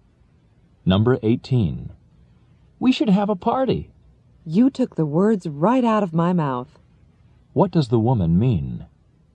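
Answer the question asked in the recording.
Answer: She was about to suggest the same thing.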